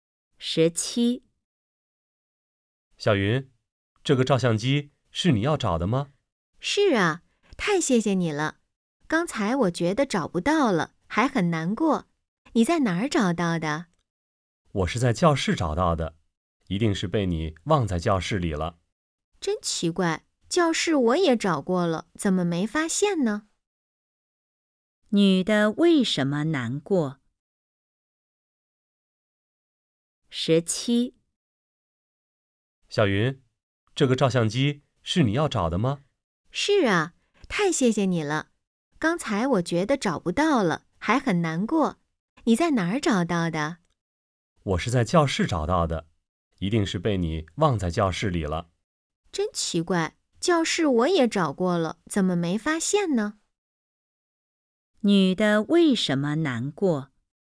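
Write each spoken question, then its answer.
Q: 女的为什么难过?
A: 她以为照相机找不到了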